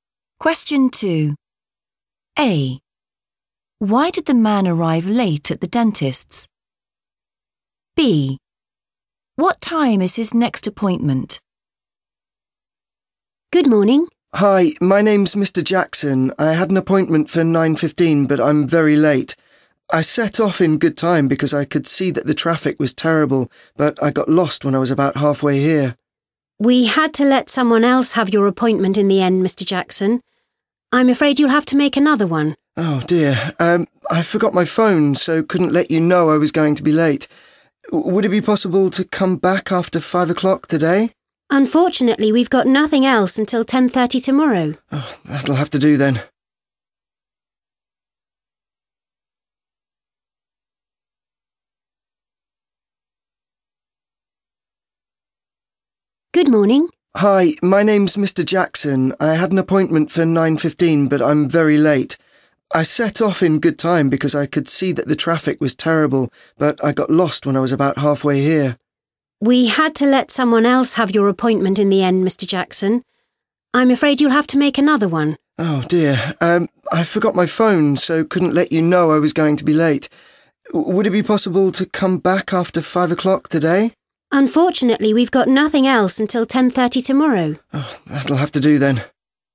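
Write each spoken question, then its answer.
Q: Why did the man arrive late at the dentist's?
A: he got lost

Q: What time is his next appointment?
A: 10:30 tomorrow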